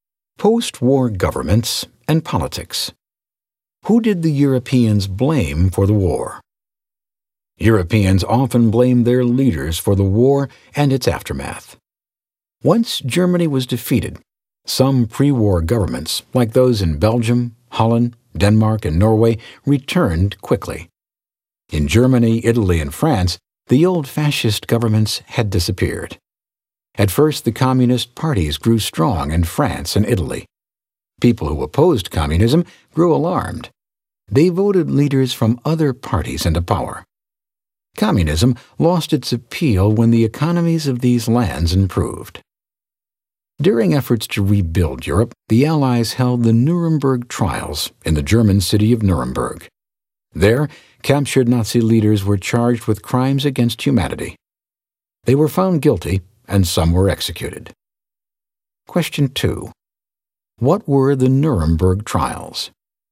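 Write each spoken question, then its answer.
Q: What were the Nuremberg trials?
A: Trials where captured Nazi leaders were charged with crimes against humanity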